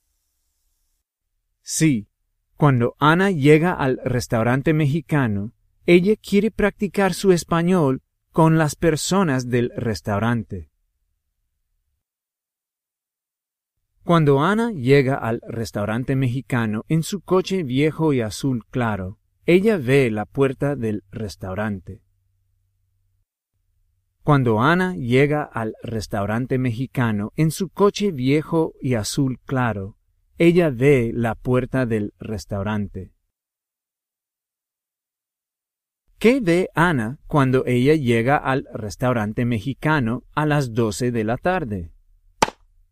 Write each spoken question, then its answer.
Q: ¿Qué ve Ana cuando ella llega al restaurante mexicano a las 12 de la tarde?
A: Ella ve la puerta del restaurante.